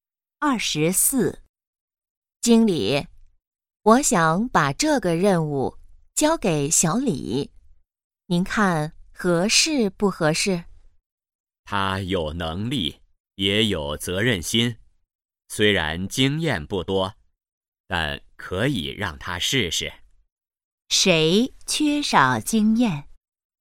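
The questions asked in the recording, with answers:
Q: 谁缺少经验?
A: 小李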